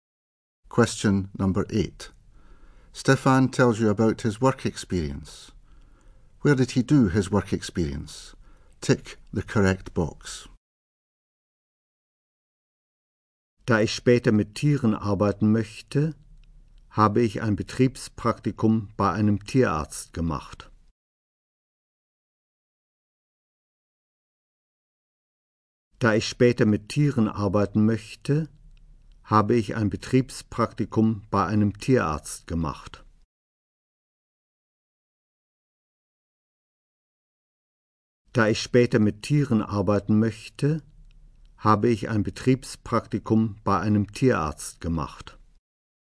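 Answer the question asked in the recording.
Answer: At a vet's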